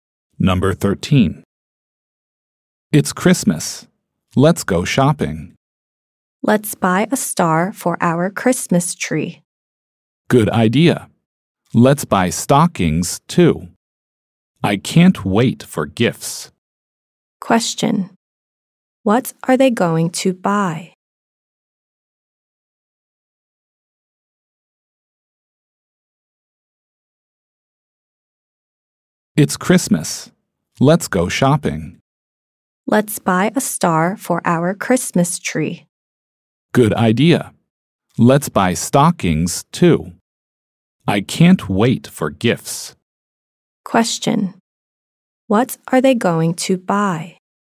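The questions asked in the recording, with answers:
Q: What are they going to buy?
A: A star and stockings.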